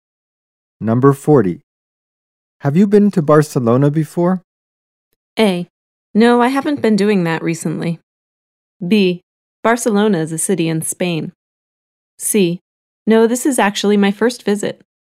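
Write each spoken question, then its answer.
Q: Have you been to Barcelona before?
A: C: No, this is actually my first visit.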